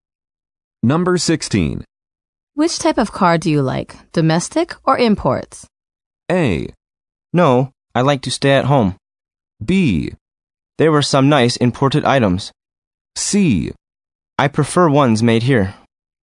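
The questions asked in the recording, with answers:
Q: Which type of car do you like, domestic or imports?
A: C: I prefer ones made here.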